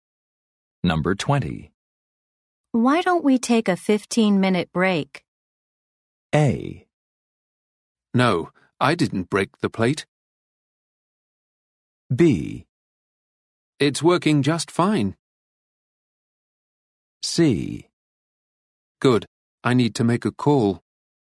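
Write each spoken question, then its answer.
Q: Why don't we take a 15-minute break?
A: C: Good, I need to make a call.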